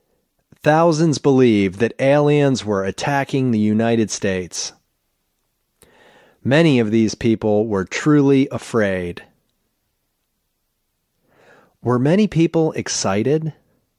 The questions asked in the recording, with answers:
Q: Were many people excited?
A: No, many people weren't excited.